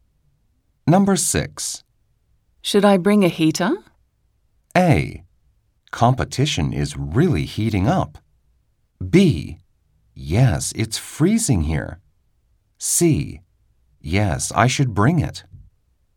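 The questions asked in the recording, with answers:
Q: Should I bring a heater?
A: B: Yes, it's freezing here.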